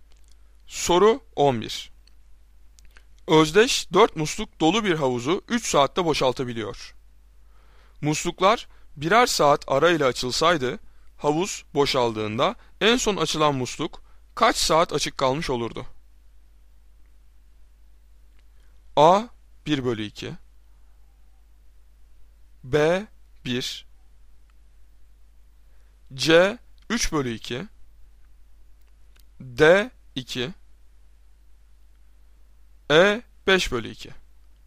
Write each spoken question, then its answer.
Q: Musluklar birer saat arayla açılsaydı, havuz boşaldığında en son açılan musluk kaç saat açık kalmış olurdu?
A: Doğru cevap C 3/2.